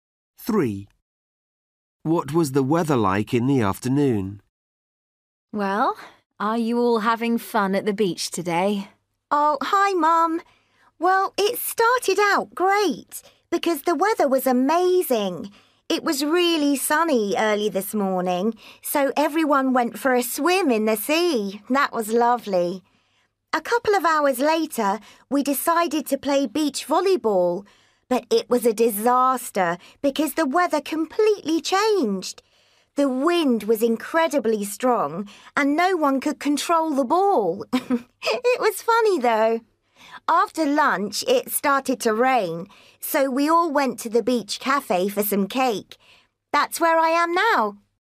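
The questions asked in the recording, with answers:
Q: What was the weather like in the afternoon?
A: rainy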